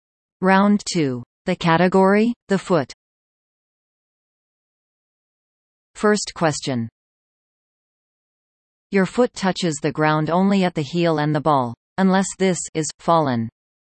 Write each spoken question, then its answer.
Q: Your foot touches the ground only at the heel and the ball.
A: The answer? Arch.